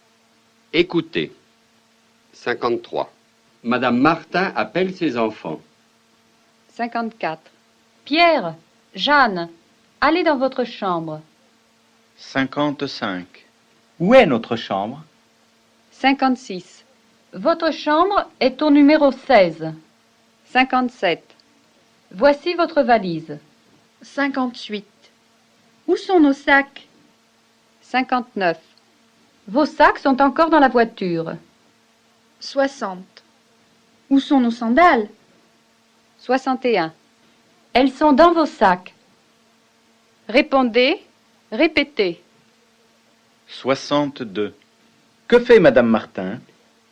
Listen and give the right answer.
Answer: Madame Martin appelle ses enfants.